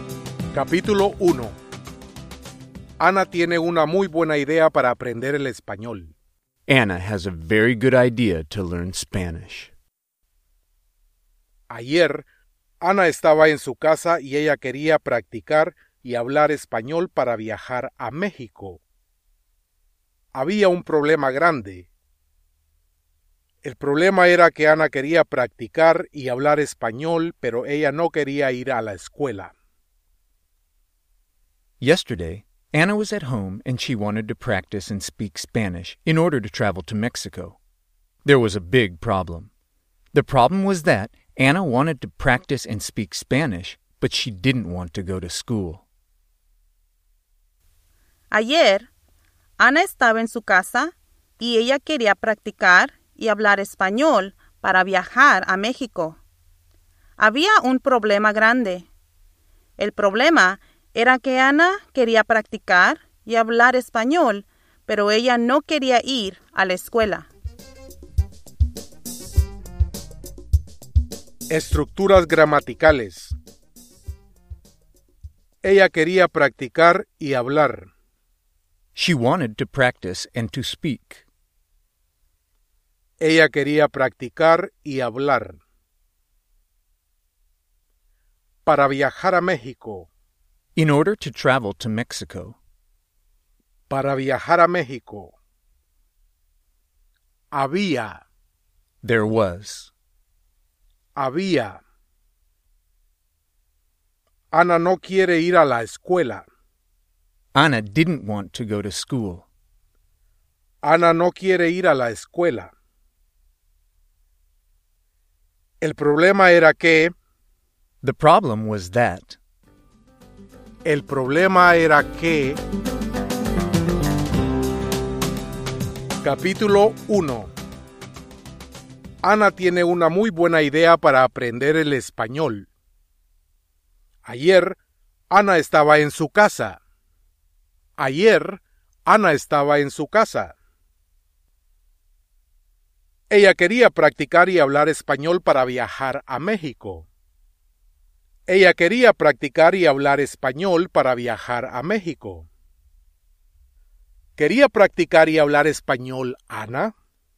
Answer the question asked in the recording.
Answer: Sí.